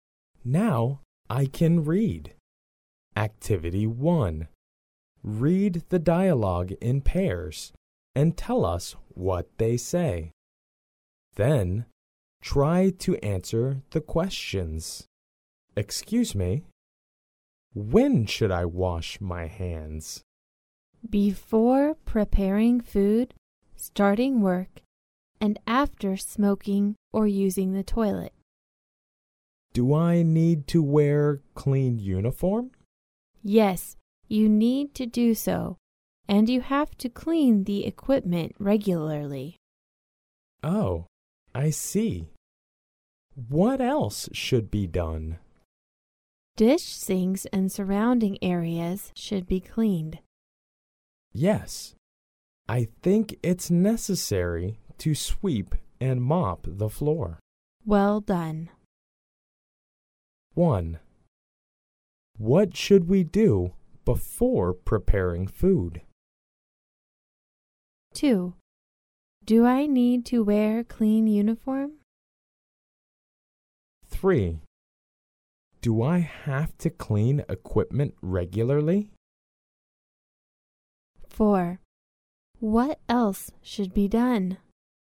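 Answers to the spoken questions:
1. Wash our hands.
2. Yes.
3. Yes.
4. Clean dish sinks and surrounding areas, and sweep and mop the floor.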